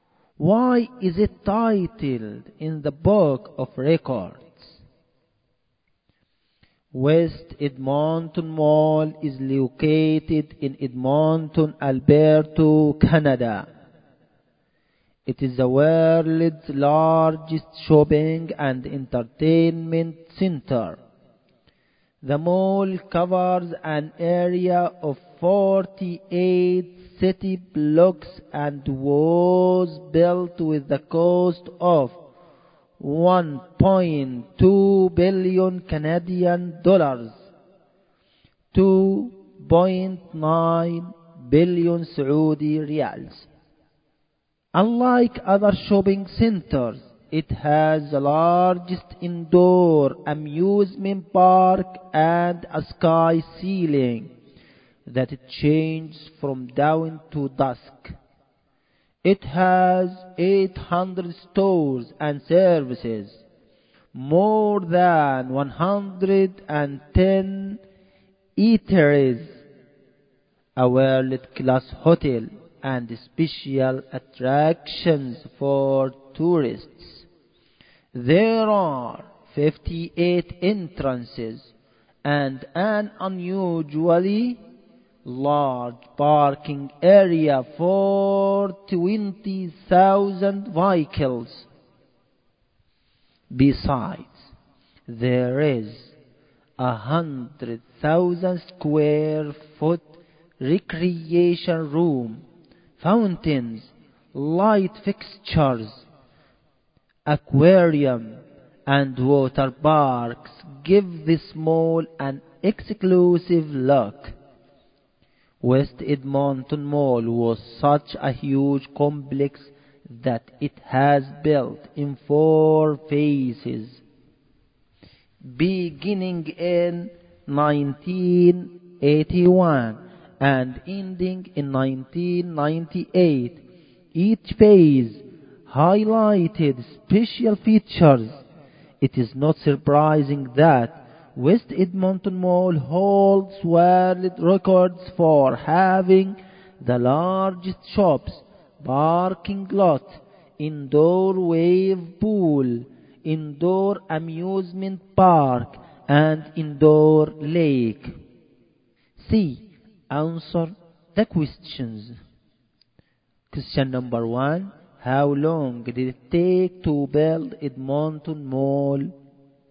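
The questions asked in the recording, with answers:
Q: How long did it take to build Edmonton Mall?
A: 17 years (1981 to 1998)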